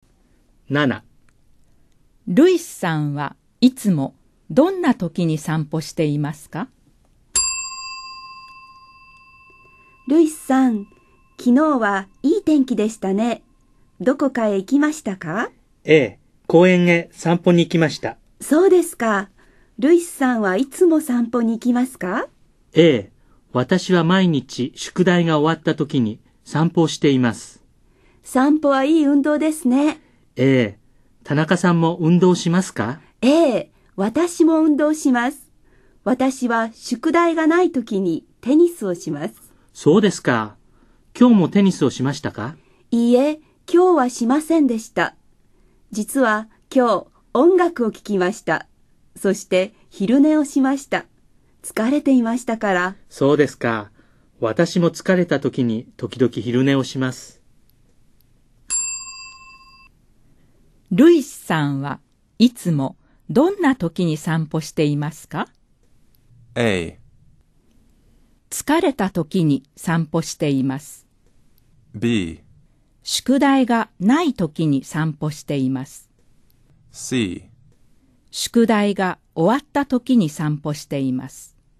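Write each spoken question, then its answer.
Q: ルイスさんはいつもどんな時に散歩していますか?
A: C: 宿題が終わった時に散歩しています。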